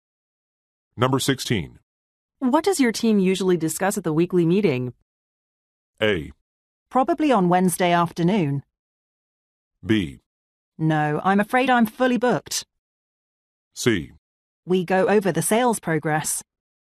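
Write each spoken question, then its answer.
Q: What does your team usually discuss at the weekly meeting?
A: C: We go over the sales progress.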